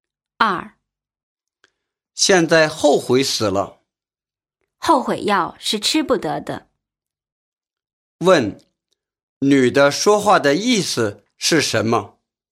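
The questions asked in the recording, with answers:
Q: 女的说话的意思是什么?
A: 后悔也没有用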